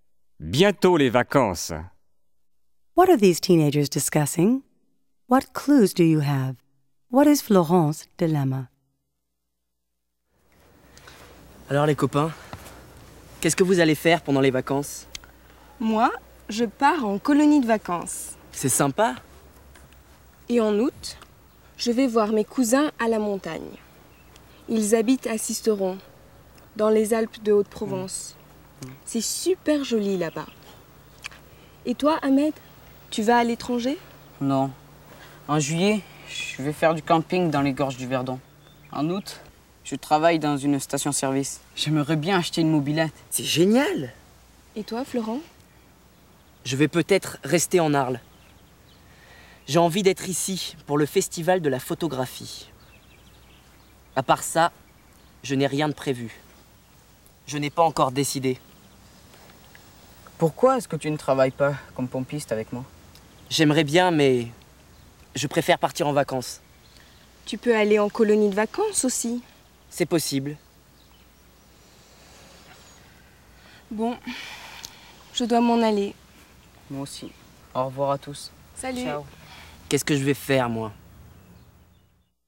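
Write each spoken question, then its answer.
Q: What are these teenagers discussing?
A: Their plans for the summer vacation

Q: What is Florence's dilemma?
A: She hasn't decided what to do for vacation: stay in Arles for the photography festival, work at the gas station, or go away (e.g., to summer camp)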